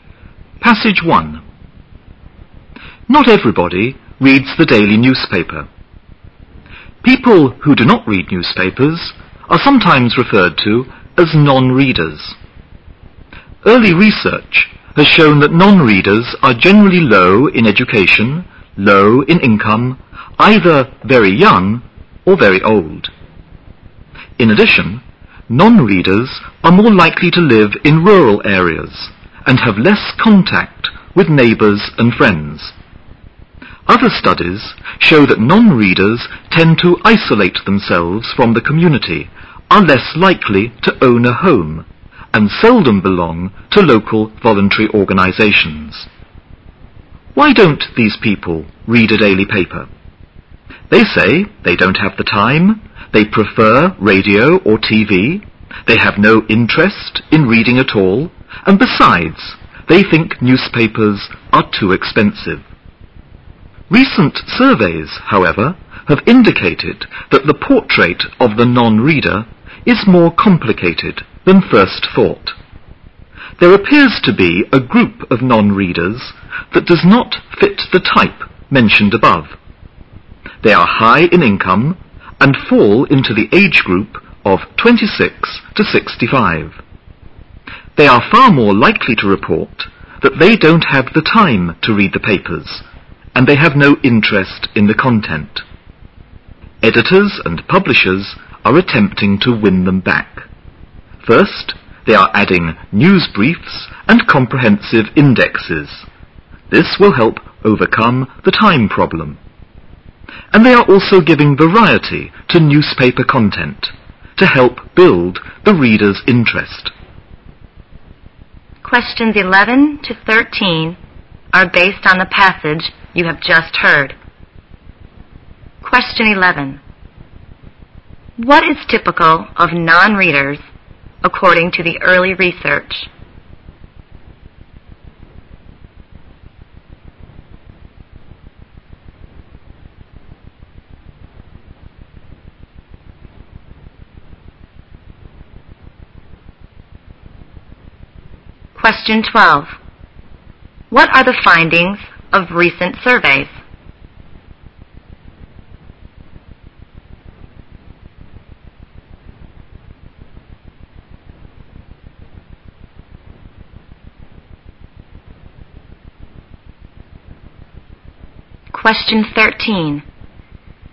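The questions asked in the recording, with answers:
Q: What is typical of non-readers according to the early research?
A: Low education and income, very young or very old

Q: What are the findings of recent surveys?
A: Some non-readers are high-income people aged 26 to 65

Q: What are editors and publishers doing to attract the non-readers?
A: Adding news briefs and indexes and varying content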